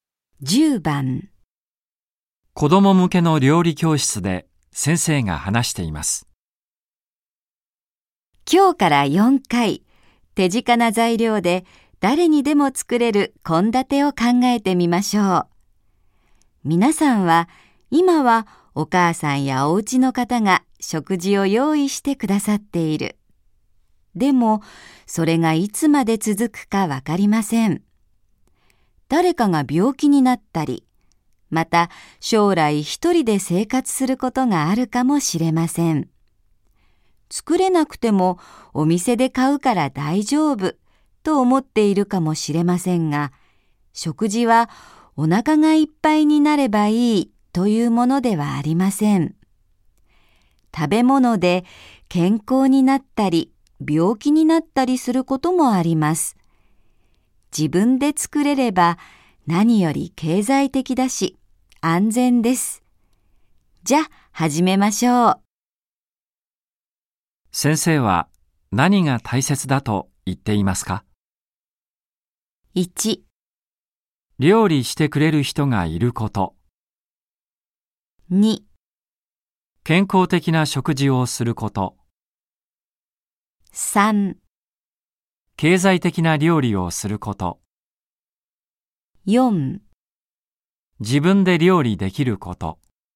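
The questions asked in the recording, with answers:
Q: 先生は何が大切だと言っていますか ?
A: 4: 自分で料理できること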